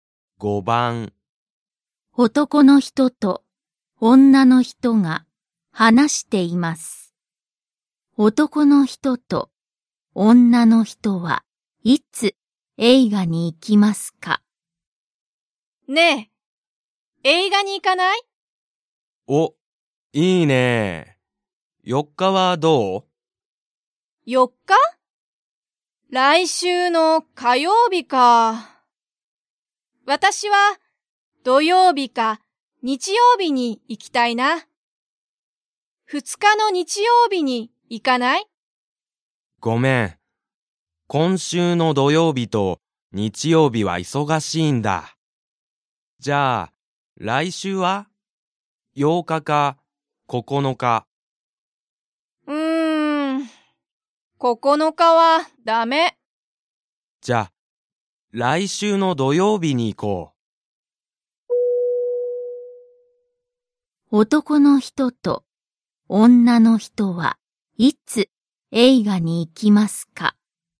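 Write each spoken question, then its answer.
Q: 男の人と女の人はいつ映画に行きますか?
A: 来週の土曜日(8日)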